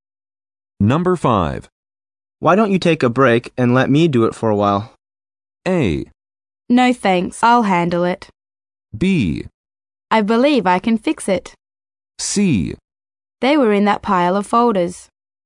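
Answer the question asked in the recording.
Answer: A: No thanks, I'll handle it.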